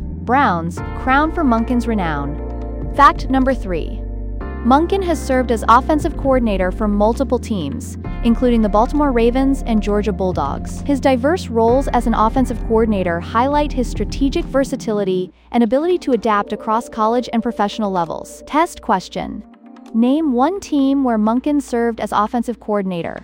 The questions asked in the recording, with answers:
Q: Name one team where Monken served as offensive coordinator.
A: Correct answer. Baltimore Ravens or Georgia Bulldogs.